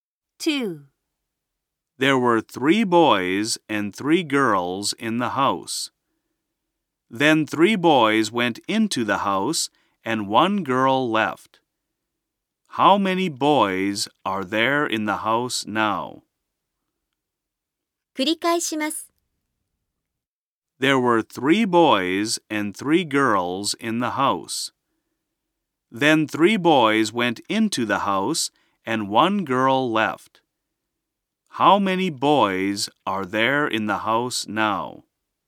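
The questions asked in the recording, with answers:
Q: How many boys are there in the house now?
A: Six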